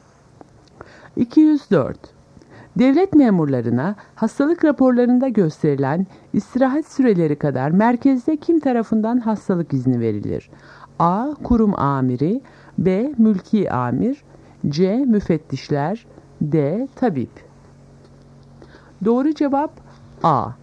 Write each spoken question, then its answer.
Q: Devlet memurlarına hastalık raporlarında gösterilen istirahat süreleri kadar merkezde kim tarafından hastalık izni verilir?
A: Doğru cevap A. Kurum amiri.